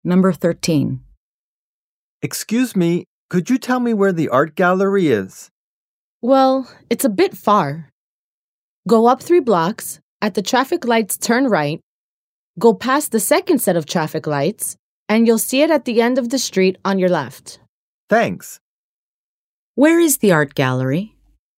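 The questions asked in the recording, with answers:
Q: Where is the art gallery?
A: Up 3 blocks, turn right at the traffic lights, past the second set of lights, at the end of the street on the left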